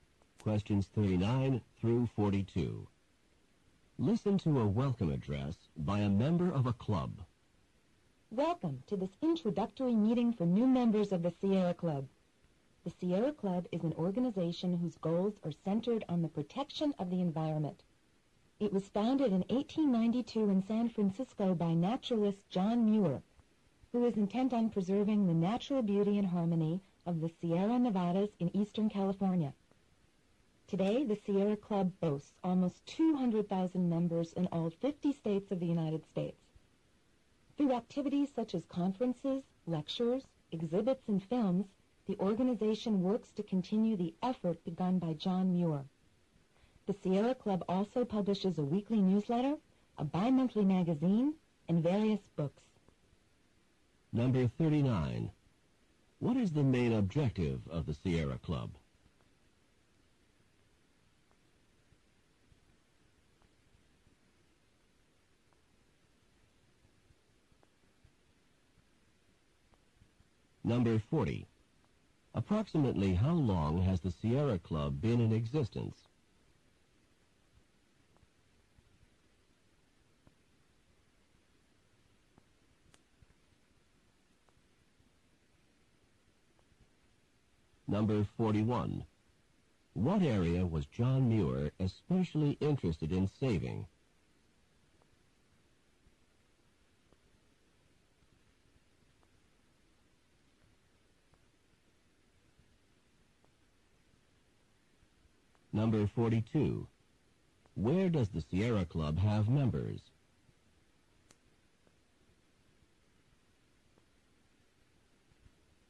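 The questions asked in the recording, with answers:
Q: What is the main objective of the Sierra Club?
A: To protect the environment

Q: Approximately how long has the Sierra Club been in existence?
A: Since 1892 (over a century)

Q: What area was John Muir especially interested in saving?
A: The Sierra Nevadas in Eastern California

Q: Where does the Sierra Club have members?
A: In all 50 states of the United States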